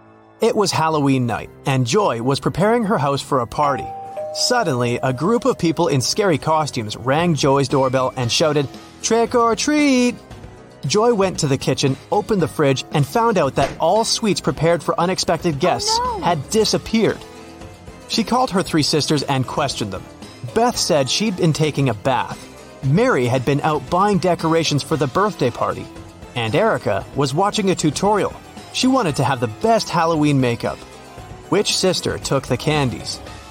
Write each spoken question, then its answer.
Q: Which sister took the candies?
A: Mary.